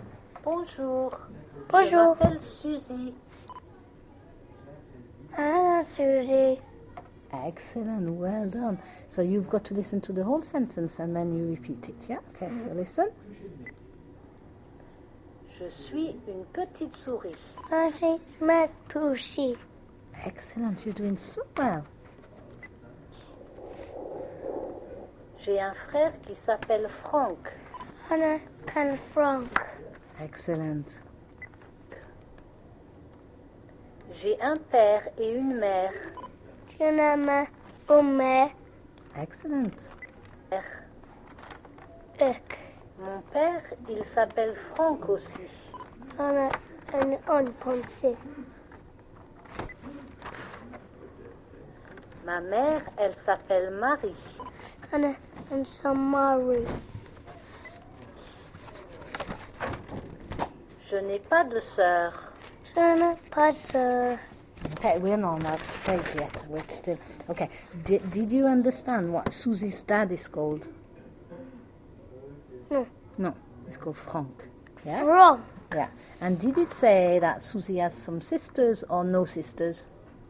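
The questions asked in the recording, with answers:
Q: And did it say that Susie has some sisters or no sisters?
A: No sisters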